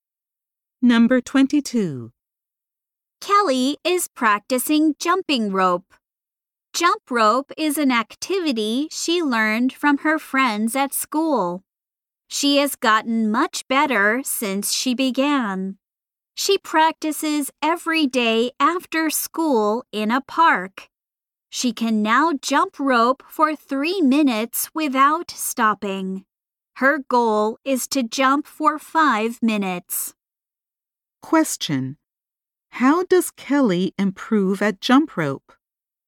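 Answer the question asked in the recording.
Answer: She practices every day after school in a park.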